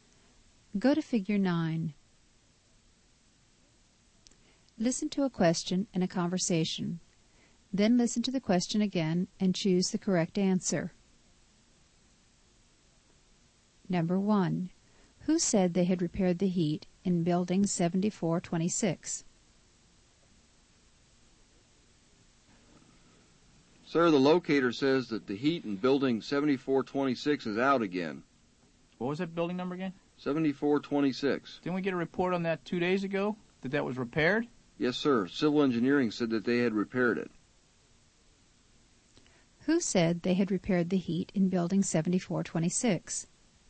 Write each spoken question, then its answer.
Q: Who said they had repaired the heat in building 7426?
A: Civil engineering said they had repaired the heat in building 7426.